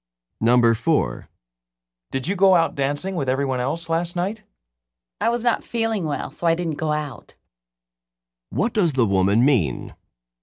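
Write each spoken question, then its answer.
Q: What does the woman mean?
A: She stayed home because she was sick.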